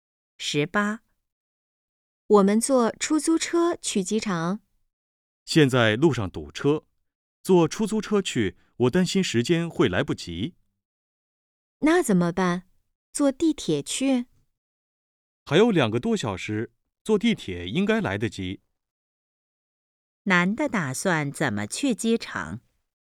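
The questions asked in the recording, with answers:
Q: 男的打算怎么去机场?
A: 坐地铁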